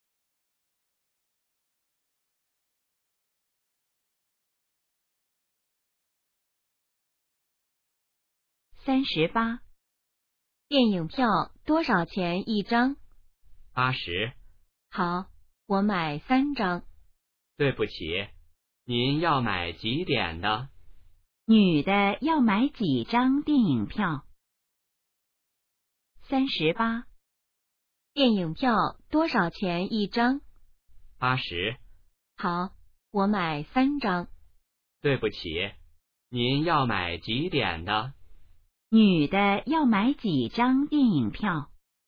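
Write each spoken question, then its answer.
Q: 女的要买几张电影票?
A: 三张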